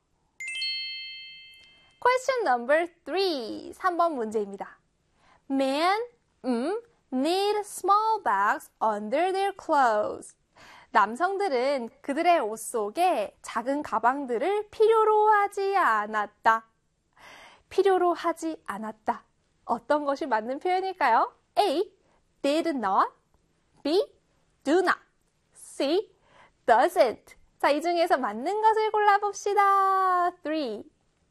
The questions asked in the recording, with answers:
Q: 필요로 하지 않았다. 어떤 것이 맞는 표현일까요?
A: 정답은요, 바로 A의 did not 입니다.